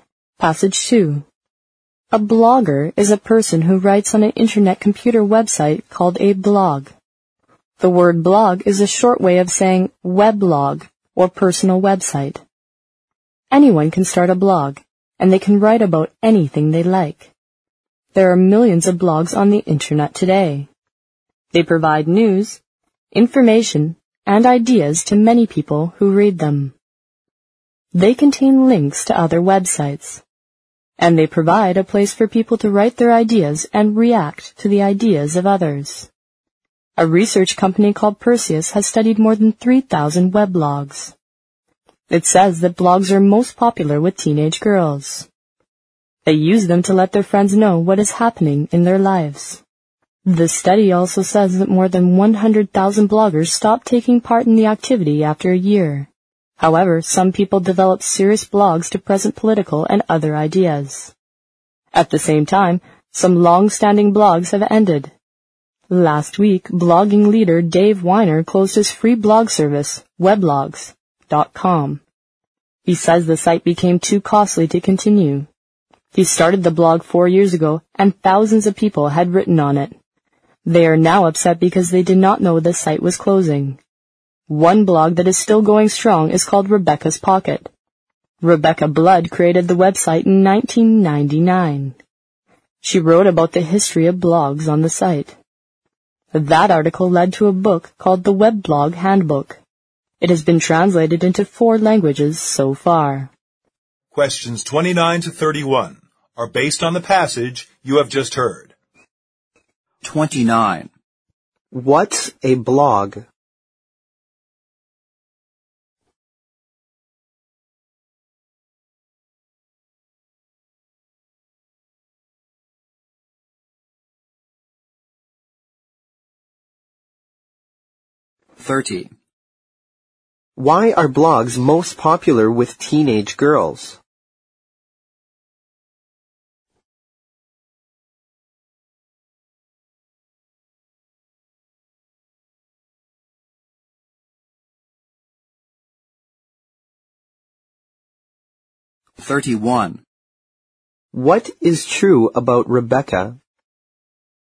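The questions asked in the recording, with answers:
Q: What's a blog?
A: A personal website on the internet where anyone can write about anything

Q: Why are blogs most popular with teenage girls?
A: They use them to let their friends know what is happening in their lives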